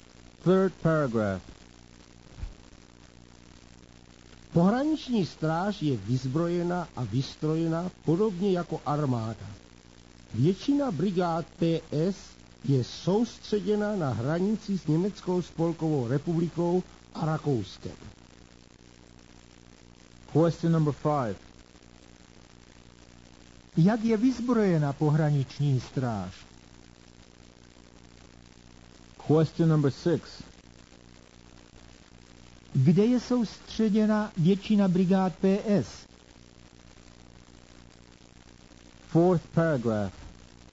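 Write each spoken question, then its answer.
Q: Jak je vyzbrojena pohraniční stráž?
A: Podobně jako armáda

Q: Kde je soustředěna většina brigád PS?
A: Na hranici s Německou spolkovou republikou a Rakouskem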